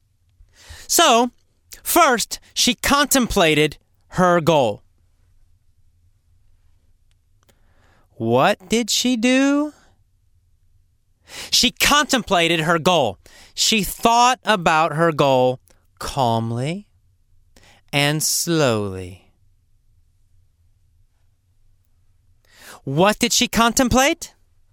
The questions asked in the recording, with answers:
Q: What did she contemplate?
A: Her goal. She contemplated her goal.